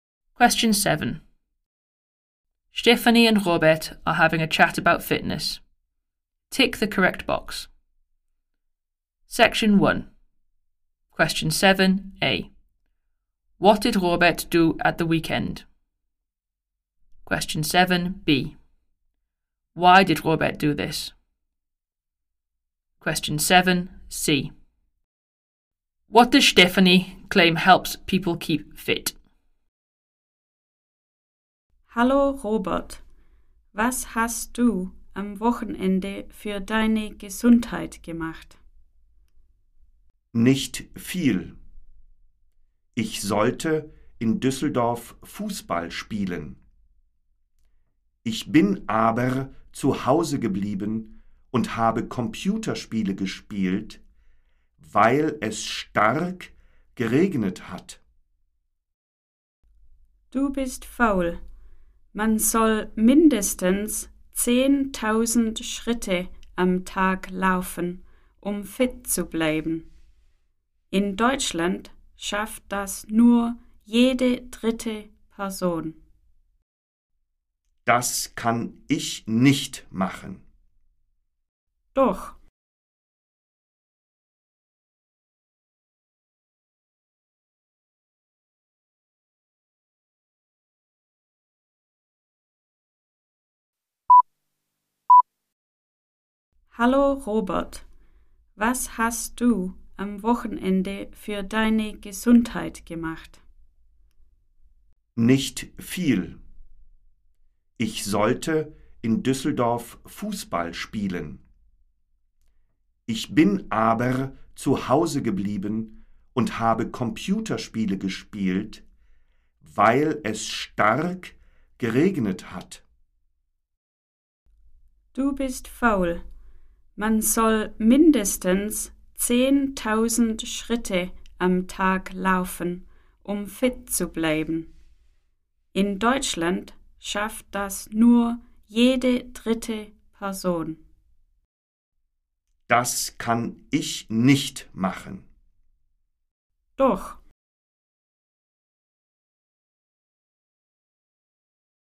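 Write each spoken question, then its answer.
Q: What did Robert do at the weekend?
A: Stayed at home and played computer games

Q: Why did Robert do this?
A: Because it rained heavily

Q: What does Stephanie claim helps people keep fit?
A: Walking at least 10,000 steps a day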